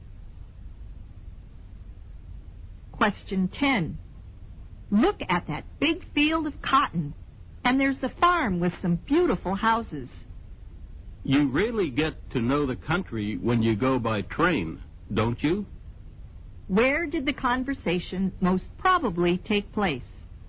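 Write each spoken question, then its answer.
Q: Where did the conversation most probably take place?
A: On a train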